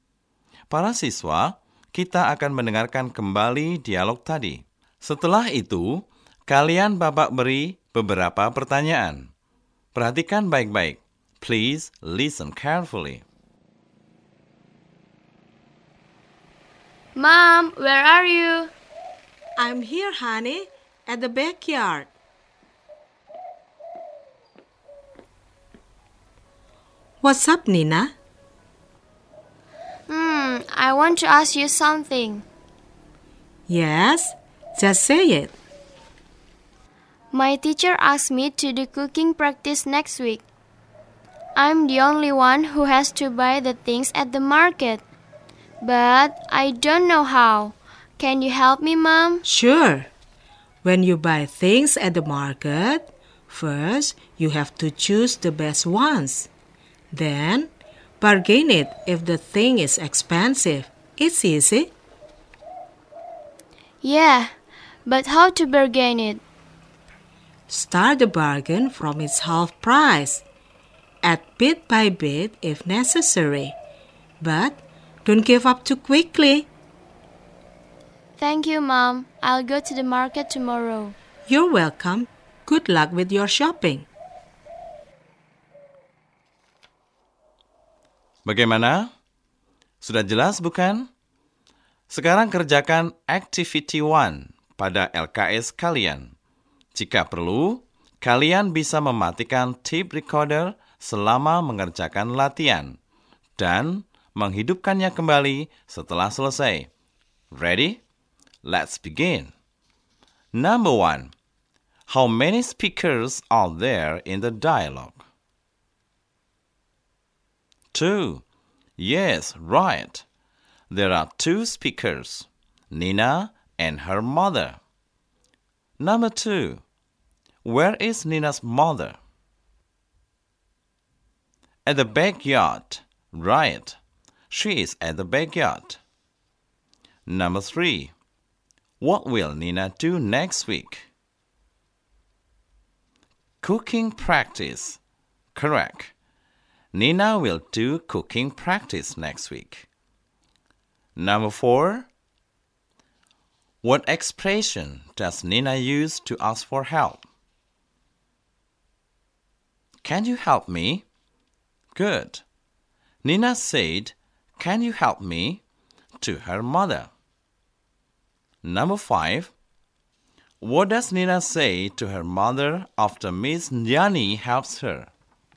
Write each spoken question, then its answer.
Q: How many speakers are there in the dialogue?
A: 2. Yes, right. There are 2 speakers, Nina and her mother.

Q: Where is Nina's mother?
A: At the backyard. Right. She is at the backyard.

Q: What will Nina do next week?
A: Cooking practice. Correct.

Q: What expression does Nina use to ask for help?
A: Can you help me? Good. Nina said, "Can you help me?" to her mother.

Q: What does Nina say to her mother after Miss Nyani helps her?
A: Thank you. Right. Nina said thank you to her mother.